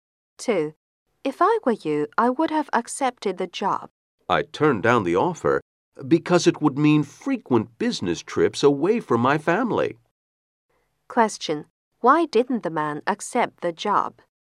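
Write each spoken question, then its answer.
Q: Why didn't the man accept the job?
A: It meant frequent business trips away from his family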